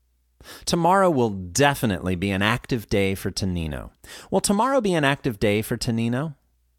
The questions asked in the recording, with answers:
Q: Will tomorrow be an active day for Tonino?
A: Yes, tomorrow will definitely be an active day for Tonino.